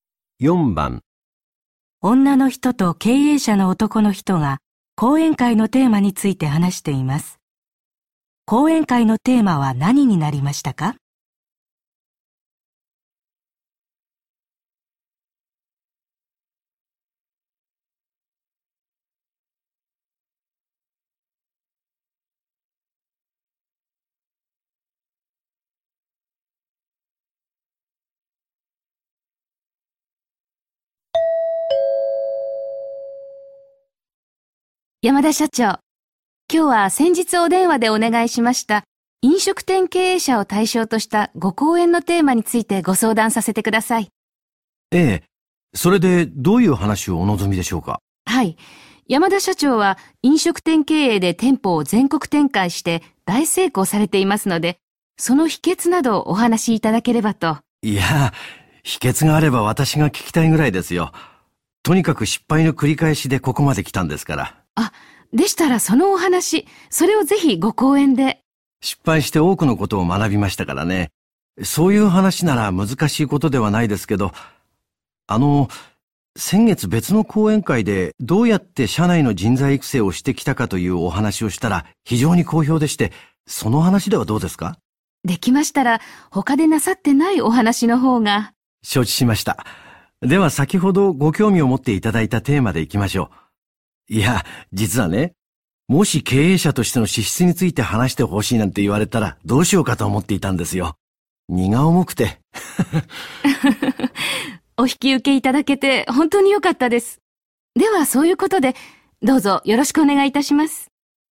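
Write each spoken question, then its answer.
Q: 講演会のテーマは何になりましたか?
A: 失敗から学んだこと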